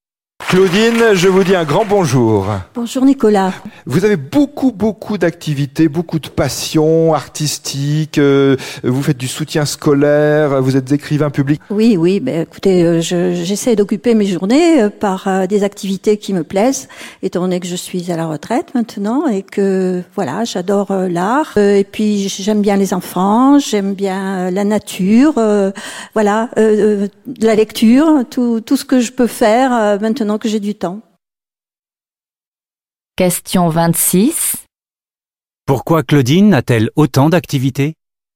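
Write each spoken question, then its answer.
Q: Pourquoi Claudine a-t-elle autant d'activités ?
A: Parce qu'elle est à la retraite et a du temps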